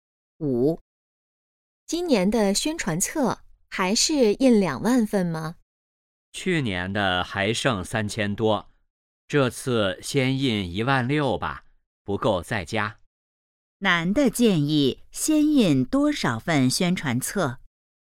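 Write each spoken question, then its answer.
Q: 男的建议先印多少份宣传册?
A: 16000份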